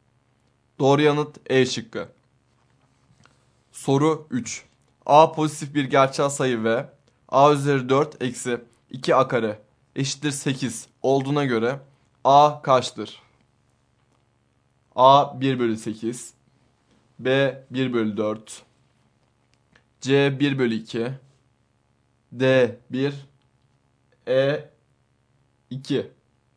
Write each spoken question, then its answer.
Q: A pozitif bir gerçel sayı ve A üzeri 4 eksi 2 A kare eşittir 8 olduğuna göre A kaçtır?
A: Doğru yanıt E şıkkı.